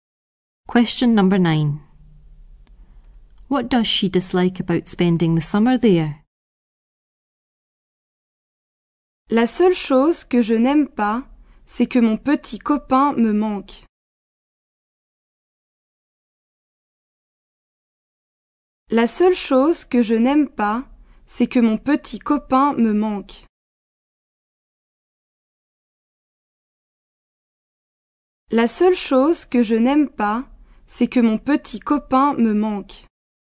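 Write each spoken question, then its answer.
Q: What does she dislike about spending the summer there?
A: She misses her boyfriend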